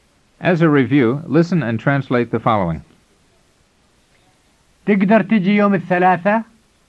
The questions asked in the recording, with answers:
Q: As a review, listen and translate the following.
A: It means, can you come over on Tuesday?